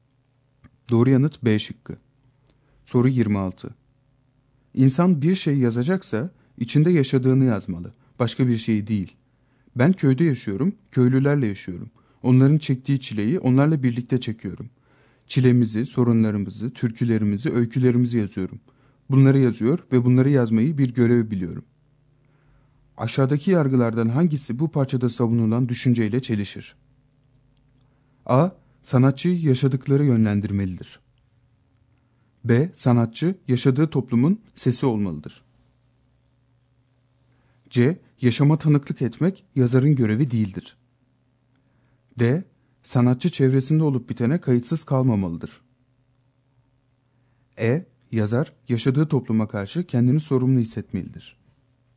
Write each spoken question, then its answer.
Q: Aşağıdaki yargılardan hangisi bu parçada savunulan düşünceyle çelişir?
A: Doğru yanıt C şıkkı.